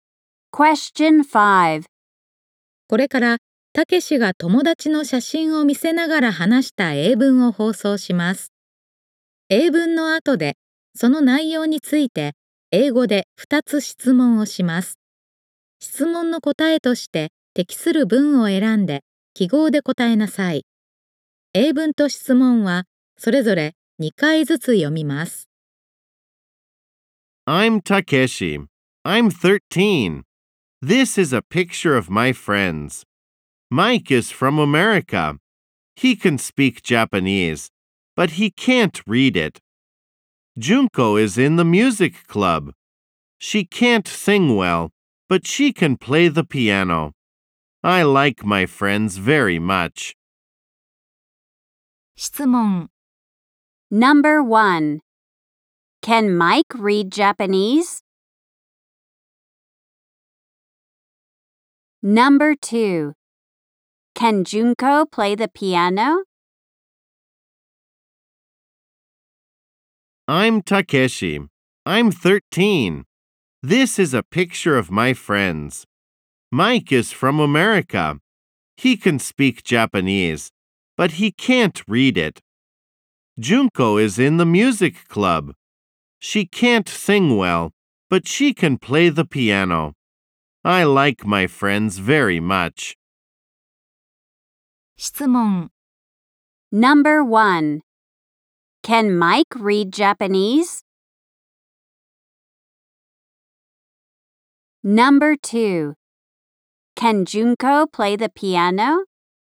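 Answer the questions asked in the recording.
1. No, he can't.
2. Yes, she can.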